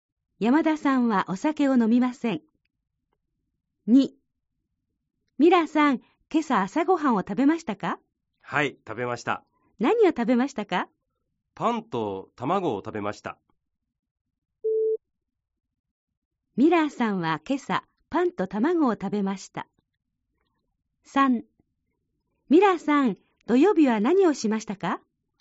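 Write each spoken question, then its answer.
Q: ミラーさんは今朝パンと卵を食べました。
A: ○(正しい)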